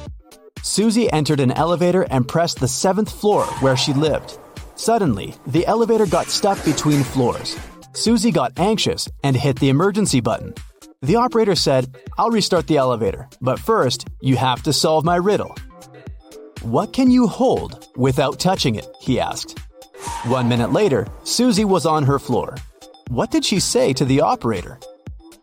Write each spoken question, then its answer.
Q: What did she say to the operator?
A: Breath.